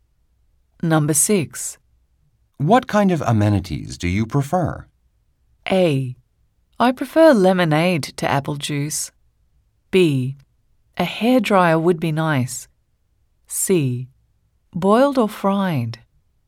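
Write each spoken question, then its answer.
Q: What kind of amenities do you prefer?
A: B: A hairdryer would be nice.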